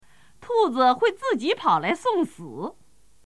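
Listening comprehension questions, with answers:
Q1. 兔子会〇〇跑来送死。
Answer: 自己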